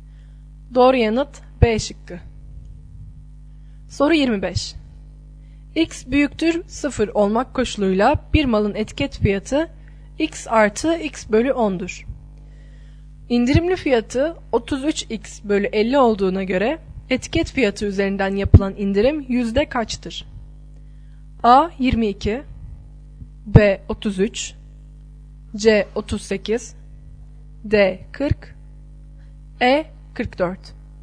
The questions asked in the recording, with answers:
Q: İndirimli fiyatı 33X bölü 50 olduğuna göre etiket fiyatı üzerinden yapılan indirim yüzde kaçtır?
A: Doğru yanıt D şıkkı.